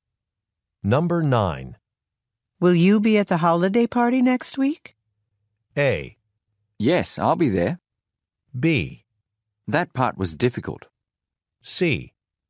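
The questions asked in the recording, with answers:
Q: Will you be at the holiday party next week?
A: A: Yes, I'll be there.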